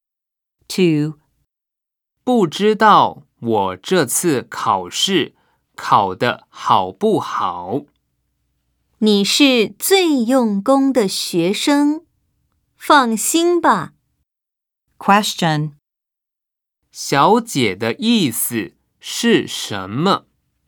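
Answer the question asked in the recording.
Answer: 他一定考得很好,不用担心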